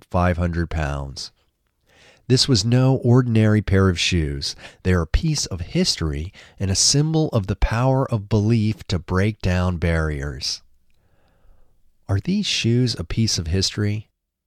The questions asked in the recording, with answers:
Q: Are these shoes a piece of history?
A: Yes, these shoes are a piece of history.